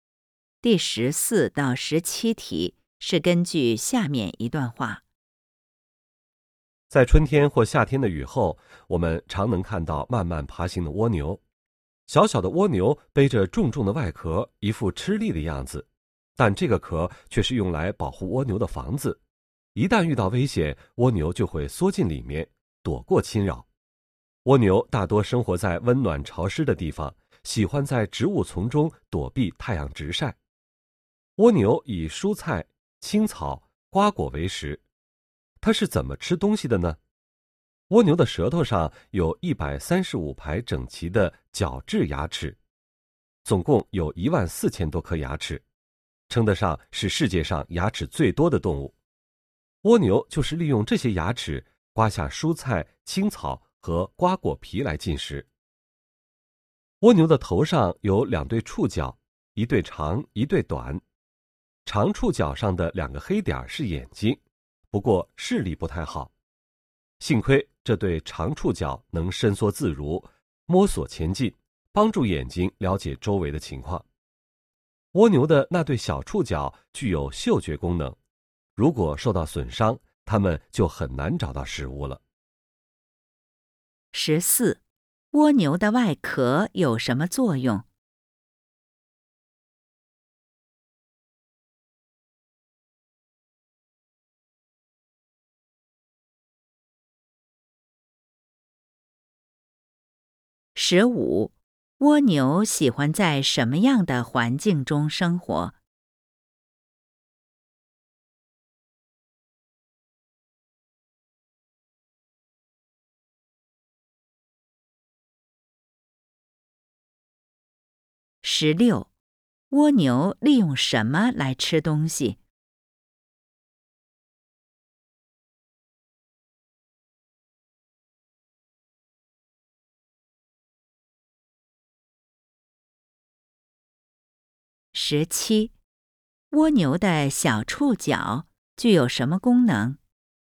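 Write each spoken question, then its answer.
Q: 蜗牛的外壳有什么作用?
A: 保护蜗牛,遇到危险时躲进去

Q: 蜗牛喜欢在什么样的环境中生活?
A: 温暖潮湿的地方

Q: 蜗牛利用什么来吃东西?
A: 舌头上的角质牙齿

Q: 蜗牛的小触角具有什么功能?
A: 嗅觉功能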